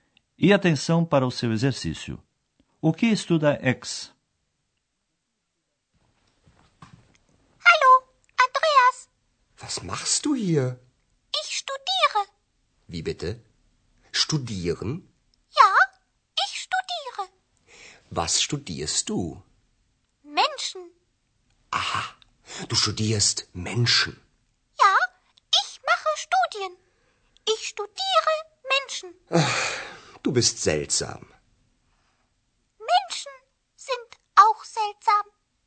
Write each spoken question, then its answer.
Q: O que estuda X?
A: Portanto, X estuda os seres humanos.